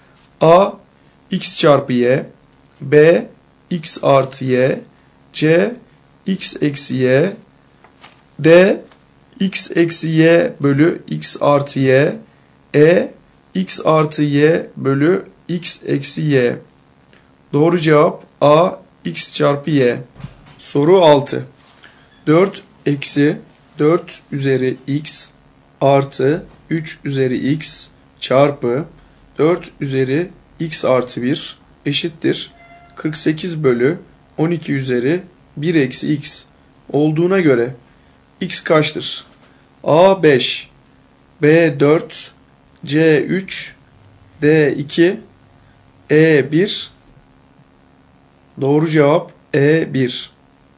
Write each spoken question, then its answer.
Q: 4 eksi 4 üzeri x artı 3 üzeri x çarpı 4 üzeri x artı 1 eşittir 48 bölü 12 üzeri 1 eksi x olduğuna göre x kaçtır?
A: Doğru cevap E 1.